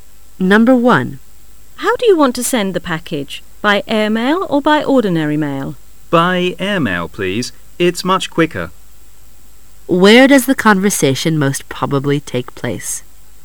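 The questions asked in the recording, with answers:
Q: Where does the conversation most probably take place?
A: At a post office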